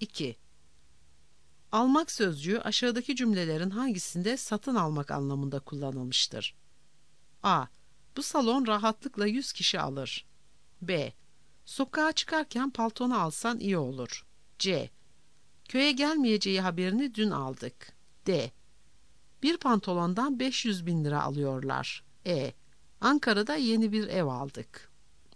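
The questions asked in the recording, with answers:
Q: Almak sözcüğü aşağıdaki cümlelerin hangisinde satın almak anlamında kullanılmıştır?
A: E: Ankara'da yeni bir ev aldık.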